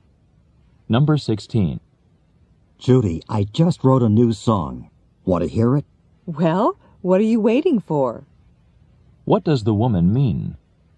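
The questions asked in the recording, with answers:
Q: What does the woman mean?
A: She wants to hear the song now.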